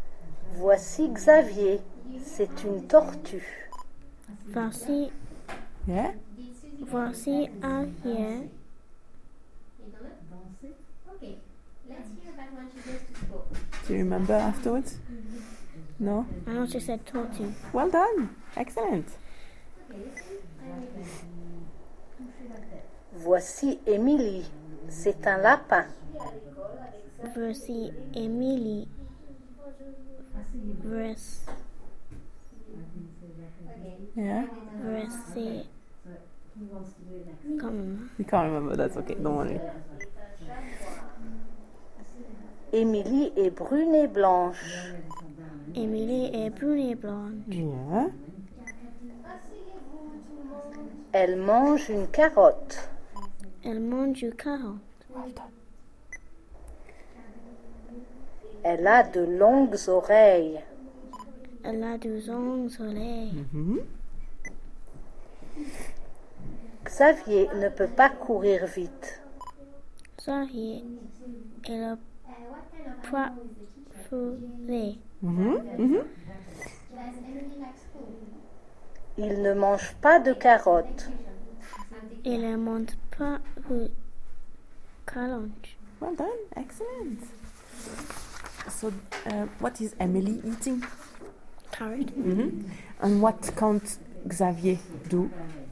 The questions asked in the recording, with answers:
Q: So, what is Emily eating?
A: Carrot.